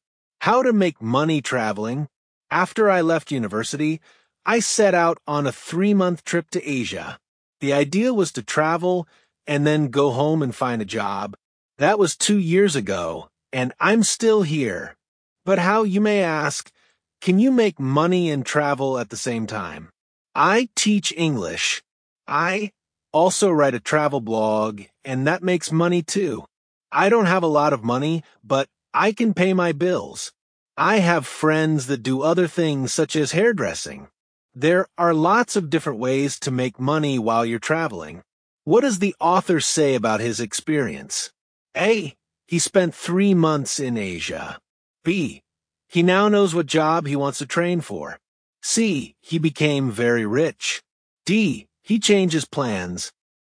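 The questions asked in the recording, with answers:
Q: What does the author say about his experience?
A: D: He changes plans.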